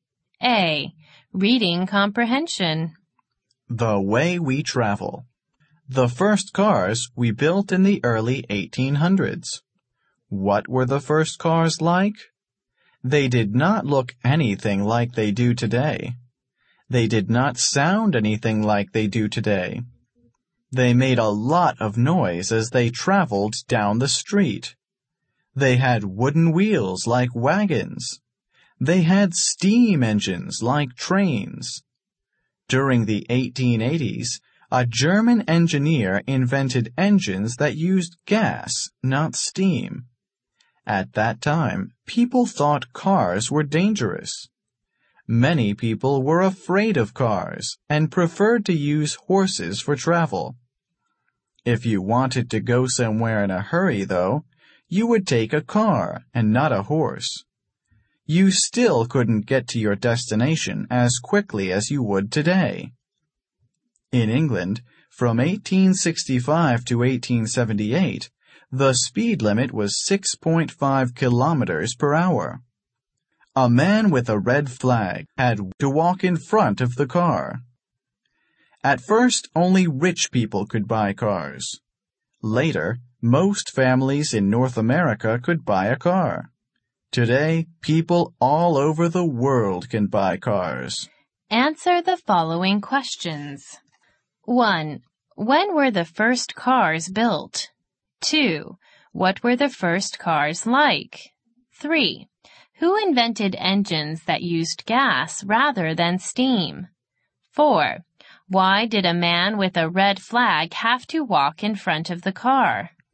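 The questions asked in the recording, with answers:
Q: When were the first cars built?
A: In the early 1800s

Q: What were the first cars like?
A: Noisy, with wooden wheels and steam engines

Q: Who invented engines that used gas rather than steam?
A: A German engineer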